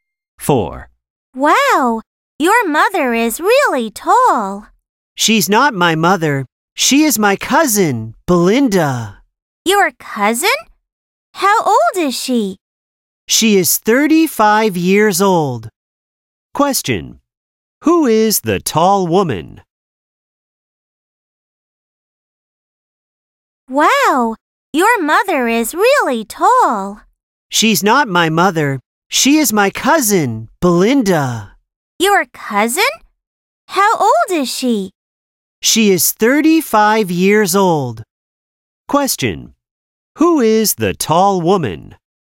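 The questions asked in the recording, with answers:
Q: Who is the tall woman?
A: Belinda, the speaker's cousin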